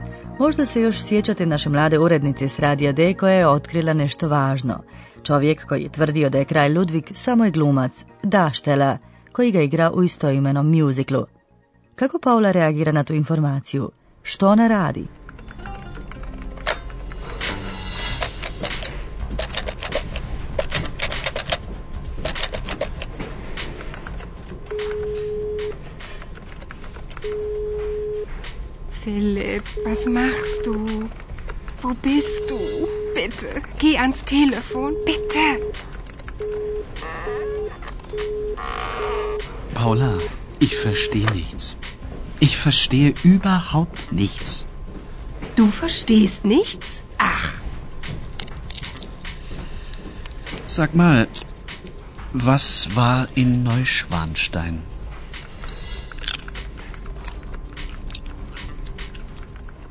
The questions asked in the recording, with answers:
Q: Što ona radi?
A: Paula pokušava dobiti Filipa na telefon, ali on se nažalost ne javlja.